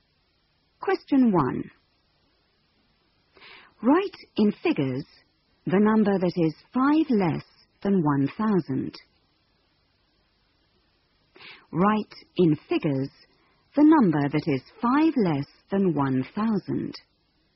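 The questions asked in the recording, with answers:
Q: Write in figures the number that is 5 less than 1,000.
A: 995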